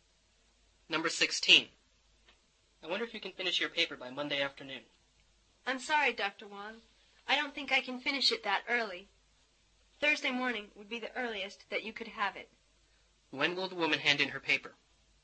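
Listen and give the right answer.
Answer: Thursday morning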